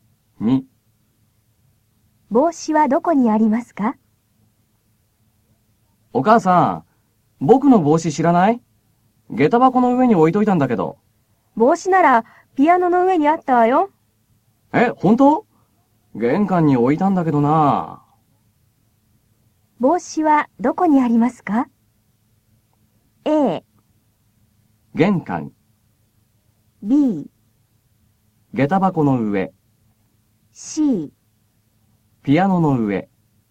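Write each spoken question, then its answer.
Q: 帽子はどこにありますか?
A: C: ピアノの上。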